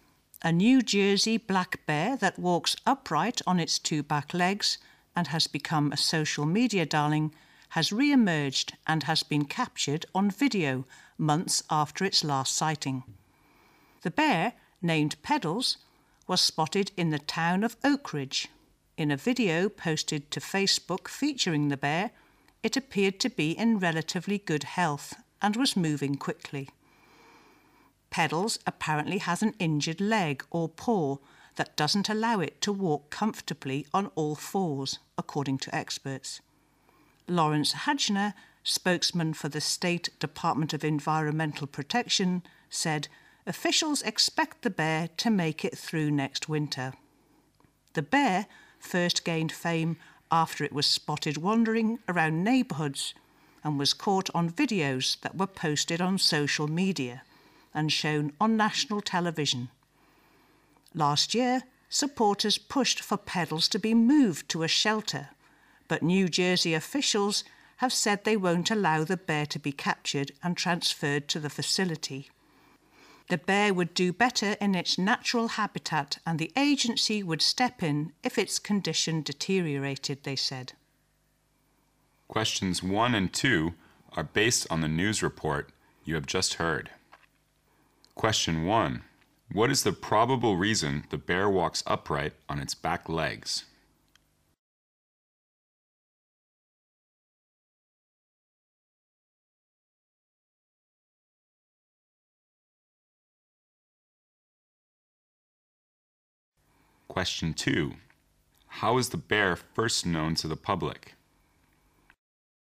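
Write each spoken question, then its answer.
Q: What is the probable reason the bear walks upright on its back legs?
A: It has an injured leg or paw

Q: How is the bear first known to the public?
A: Through videos posted on social media and shown on national television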